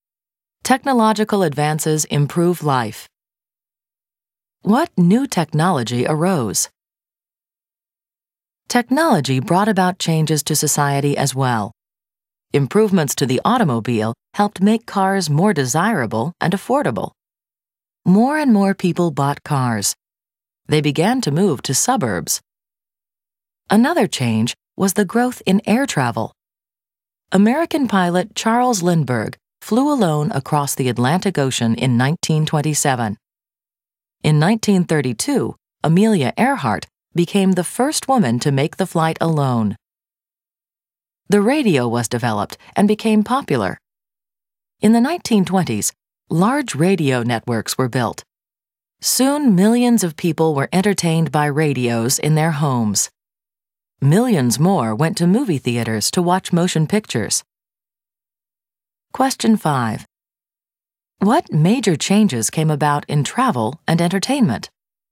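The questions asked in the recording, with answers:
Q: What major changes came about in travel and entertainment?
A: Better, more affordable cars and more air travel; radio networks and movies entertained millions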